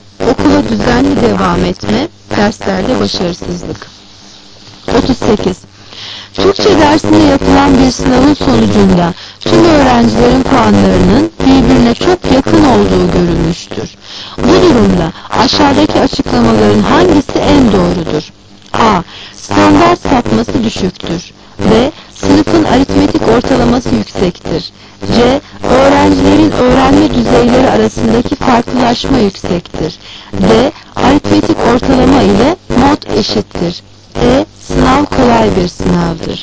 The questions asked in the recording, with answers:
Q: Bu durumda aşağıdaki açıklamaların hangisi en doğrudur?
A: Cevap A. Standart sapması düşüktür.